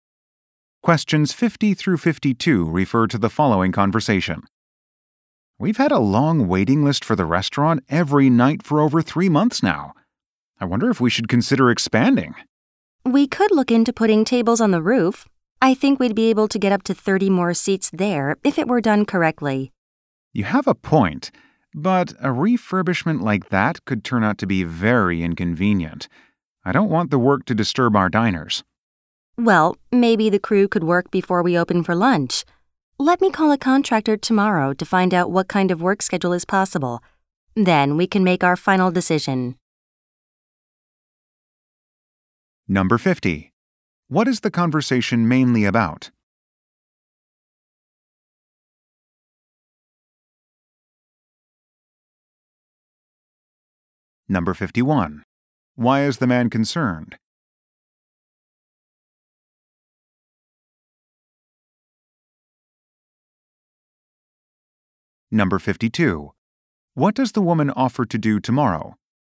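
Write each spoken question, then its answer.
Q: What is the conversation mainly about?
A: Expanding the restaurant with rooftop seating

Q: Why is the man concerned?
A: The work could disturb diners

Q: What does the woman offer to do tomorrow?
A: Call a contractor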